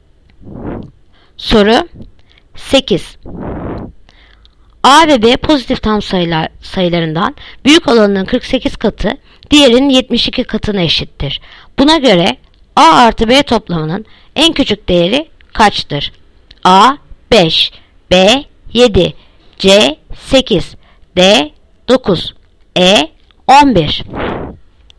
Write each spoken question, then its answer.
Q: Buna göre A artı B toplamının en küçük değeri kaçtır?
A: Yanıt Adana 5.